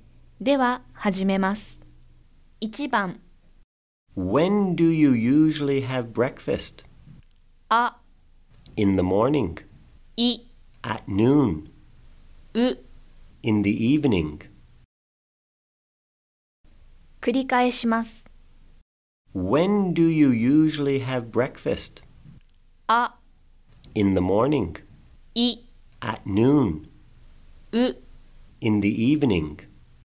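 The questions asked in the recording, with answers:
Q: When do you usually have breakfast?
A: あ: In the morning.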